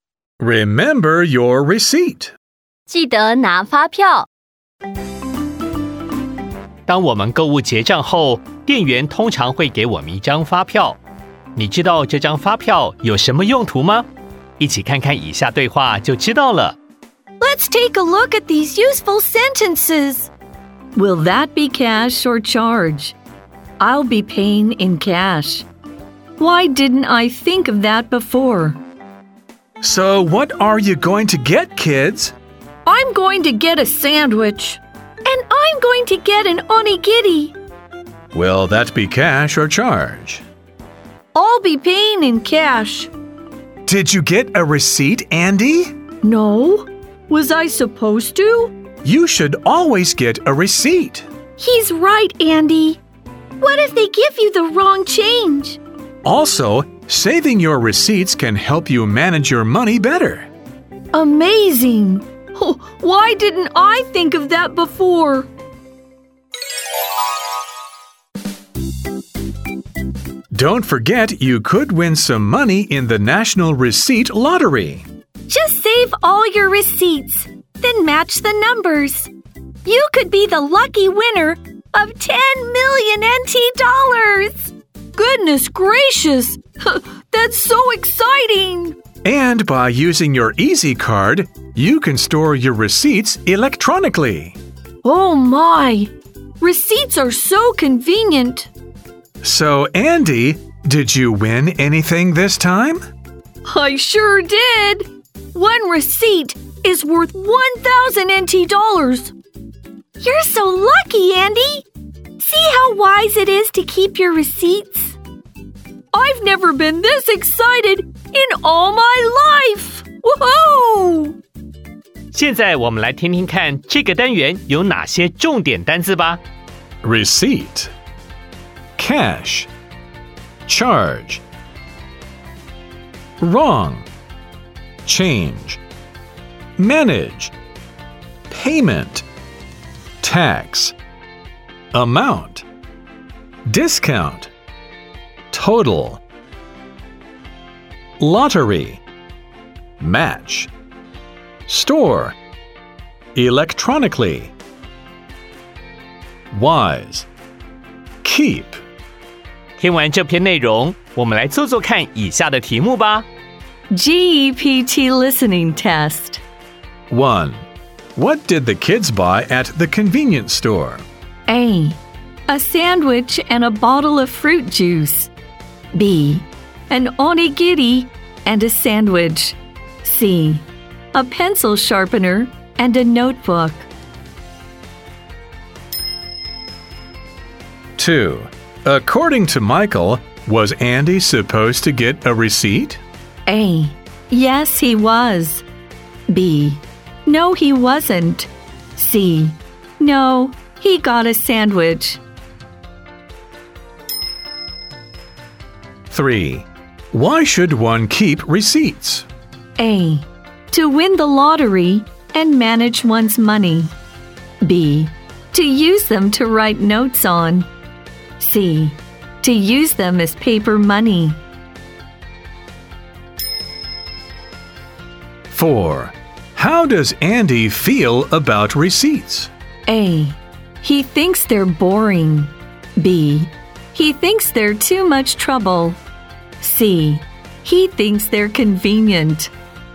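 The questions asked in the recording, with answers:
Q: What did the kids buy at the convenience store?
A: B: An onigiri and a sandwich.

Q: According to Michael, was Andy supposed to get a receipt?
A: A: Yes, he was.

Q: Why should one keep receipts?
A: A: To win the lottery and manage one's money.

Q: How does Andy feel about receipts?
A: C: He thinks they're convenient.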